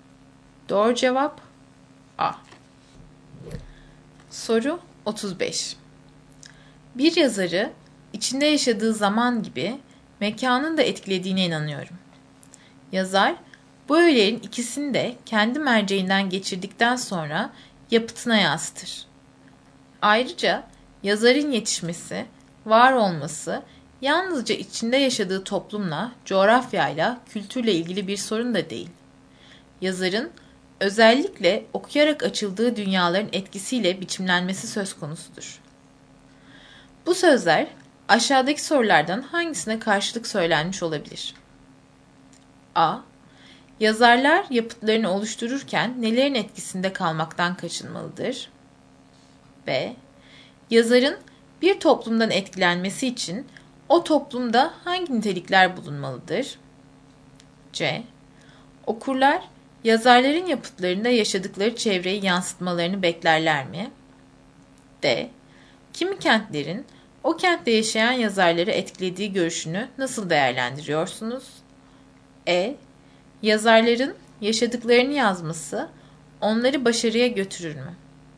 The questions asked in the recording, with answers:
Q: Bu sözler aşağıdaki sorulardan hangisine karşılık söylenmiş olabilir?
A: Doğru cevap D.